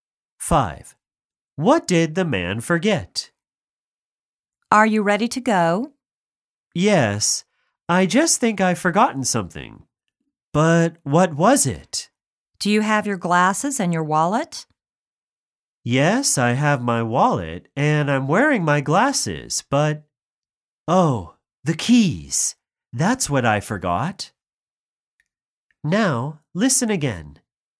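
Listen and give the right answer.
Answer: the keys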